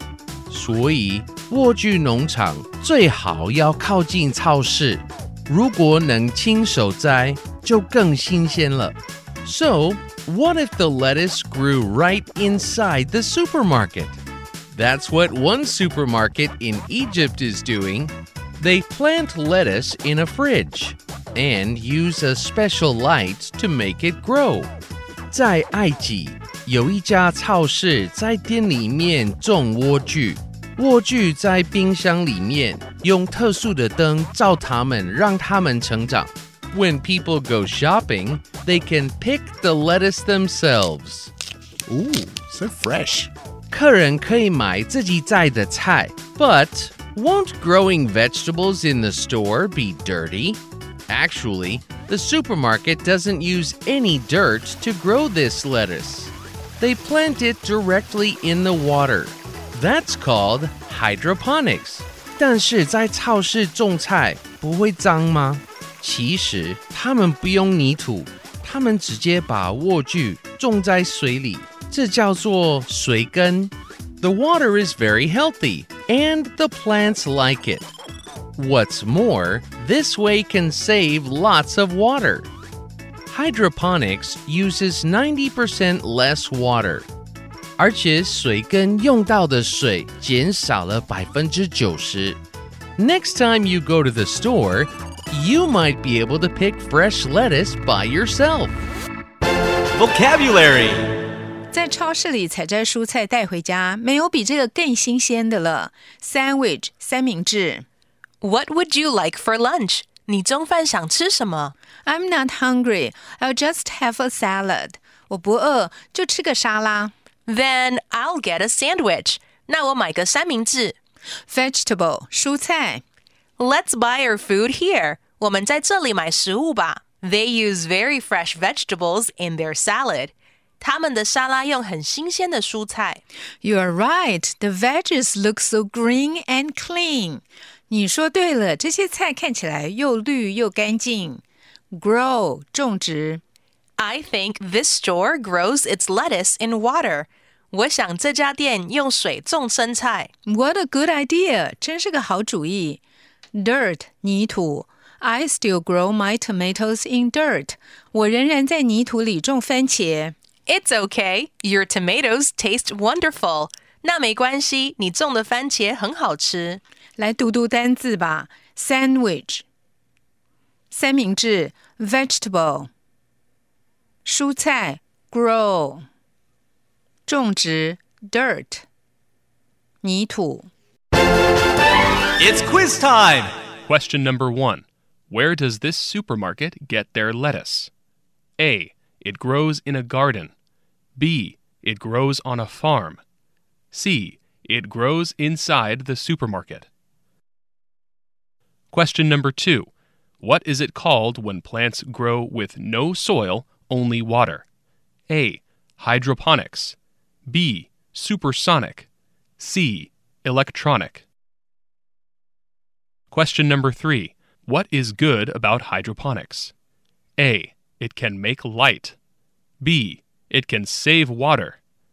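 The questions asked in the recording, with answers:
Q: Where does this supermarket get their lettuce?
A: C: It grows inside the supermarket.

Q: What is it called when plants grow with no soil?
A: A: Hydroponics.

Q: What is good about hydroponics?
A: B: It can save water.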